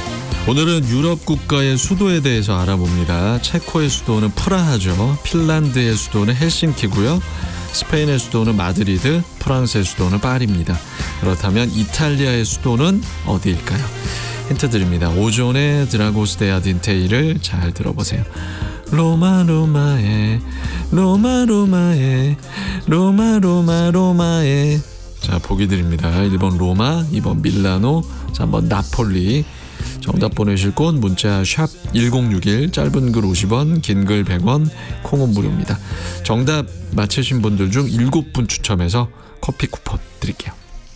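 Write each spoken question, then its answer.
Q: 그렇다면 이탈리아의 수도는 어디일까요?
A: 1: 로마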